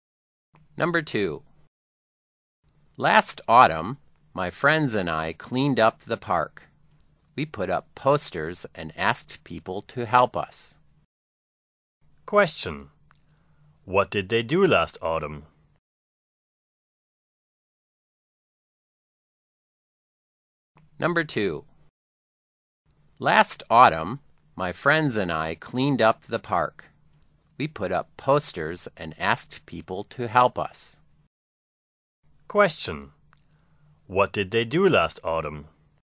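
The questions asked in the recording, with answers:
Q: What did they do last autumn?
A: They cleaned up the park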